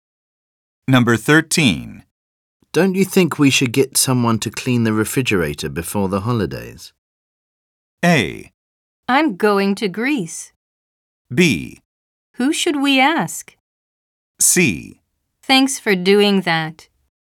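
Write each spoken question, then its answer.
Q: Don't you think we should get someone to clean the refrigerator before the holidays?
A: B: Who should we ask?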